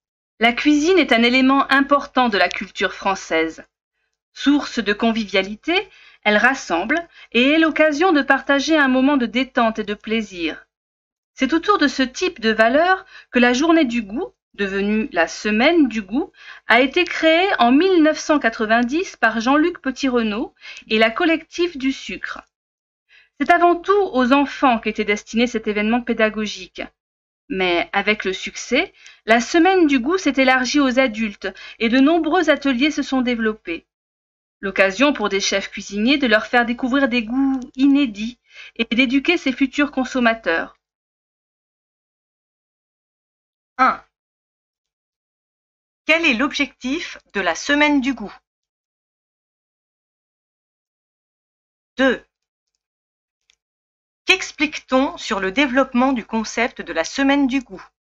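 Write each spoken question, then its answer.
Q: Qu'explique-t-on sur le développement du concept de la Semaine du goût?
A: D'abord destinée aux enfants, elle s'est élargie aux adultes avec le succès, et de nombreux ateliers se sont développés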